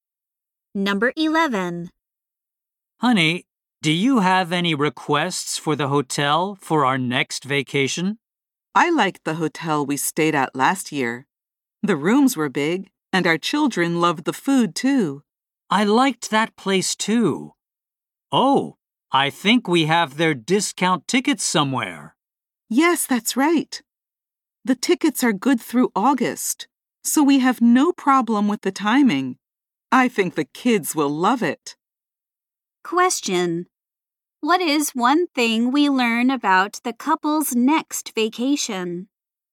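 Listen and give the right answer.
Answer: They'll probably stay at last year's hotel using discount tickets that are good through August.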